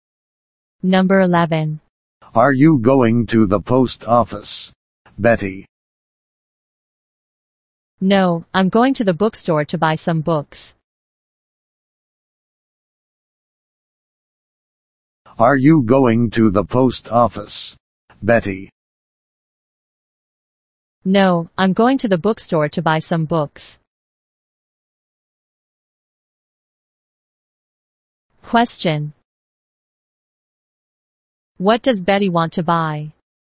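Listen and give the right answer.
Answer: Some books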